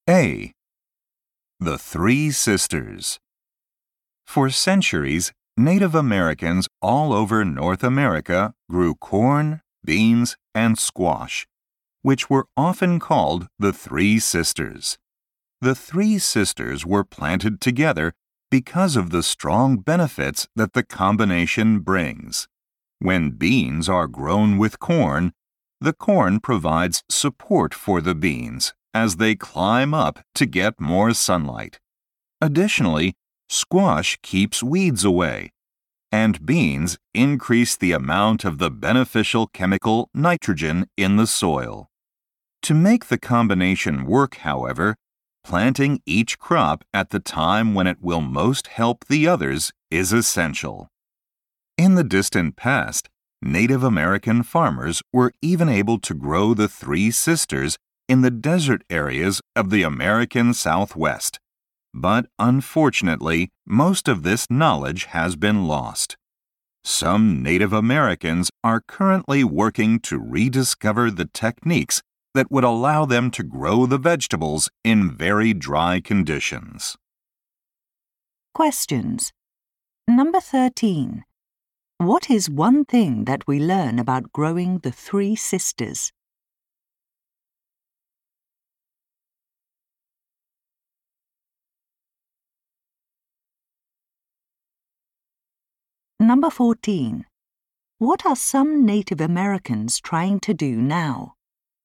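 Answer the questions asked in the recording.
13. Each crop must be planted at the right time to help the others.
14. Rediscover techniques to grow the vegetables in very dry conditions.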